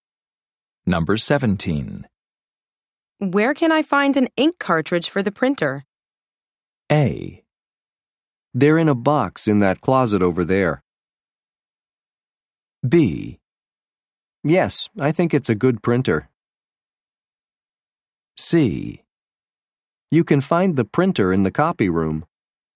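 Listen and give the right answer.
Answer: A: They're in a box in that closet over there.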